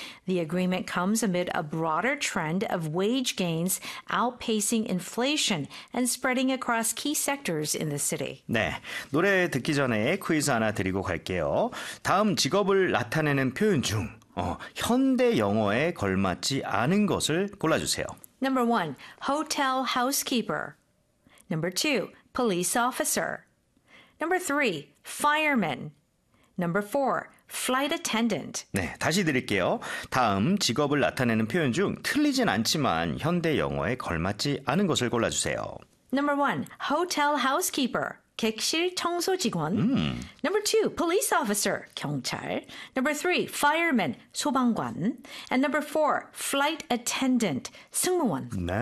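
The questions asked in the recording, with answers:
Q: 다음 직업을 나타내는 표현 중 틀리진 않지만 현대 영어에 걸맞지 않은 것을 골라주세요.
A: 3: fireman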